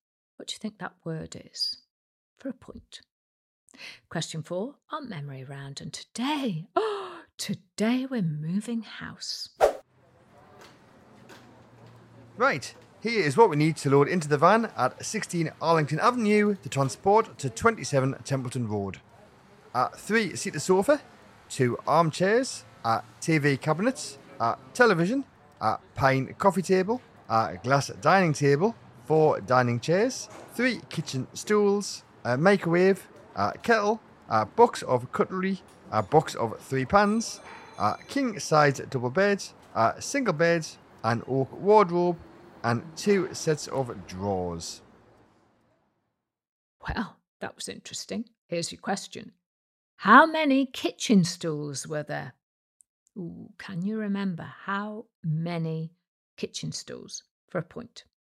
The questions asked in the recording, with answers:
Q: How many kitchen stools were there?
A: the answer is 3 kitchen stools.